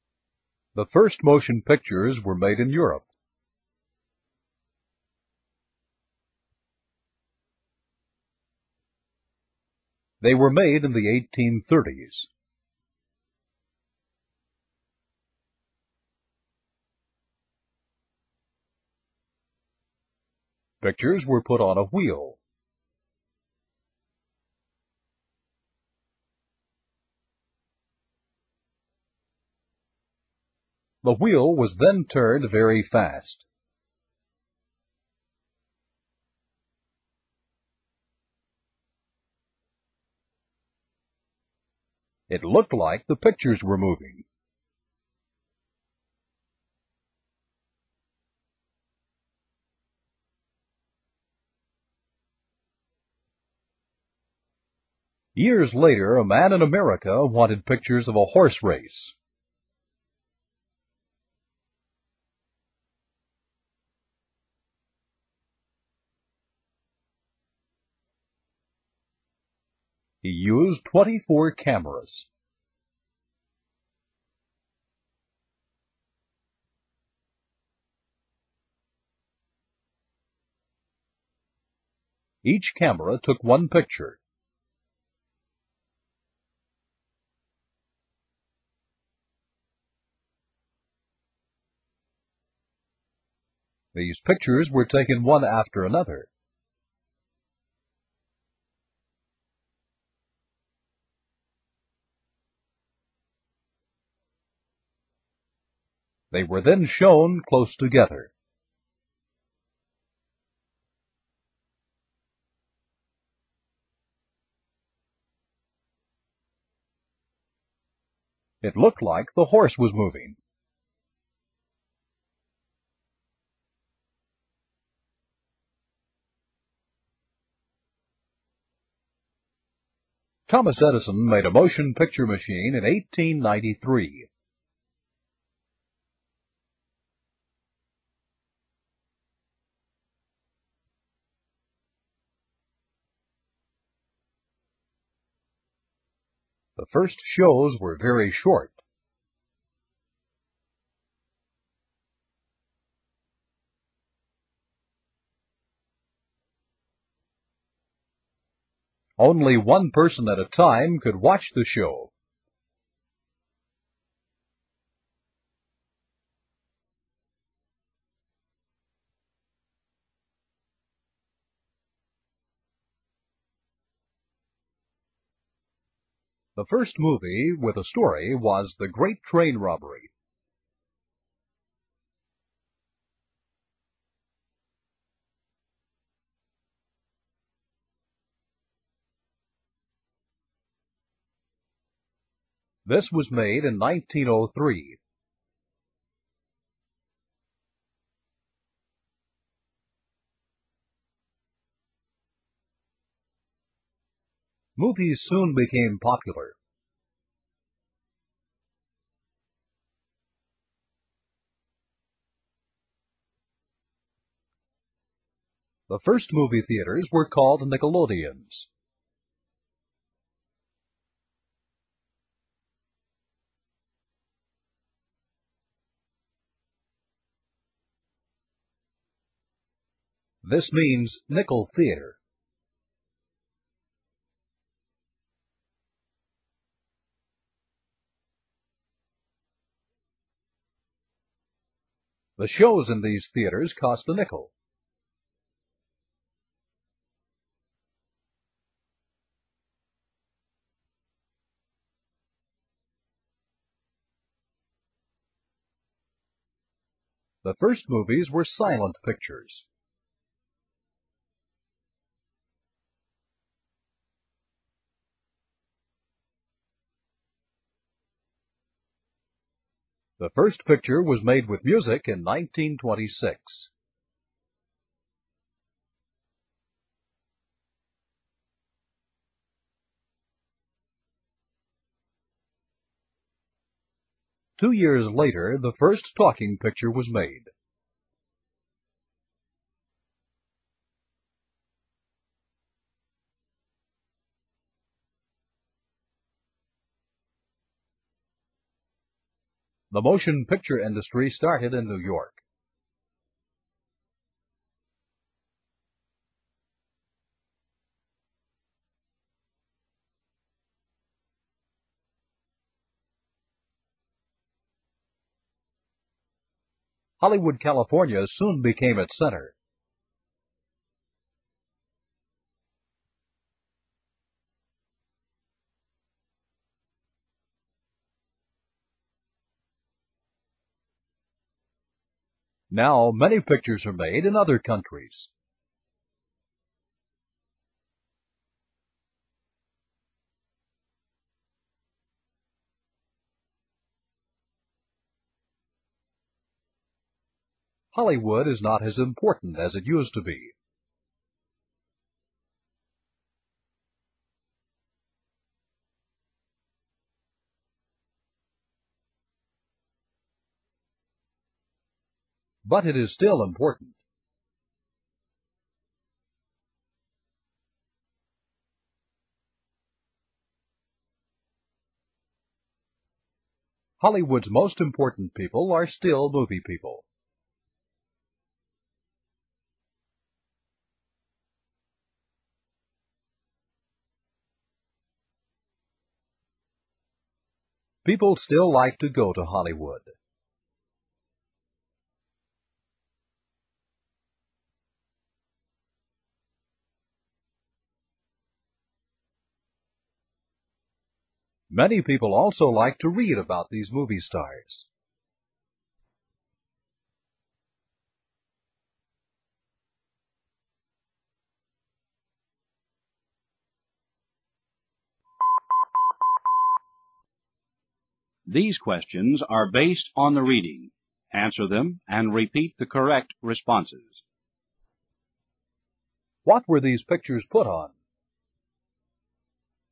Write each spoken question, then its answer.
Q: What were these pictures put on?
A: they were put on a wheel.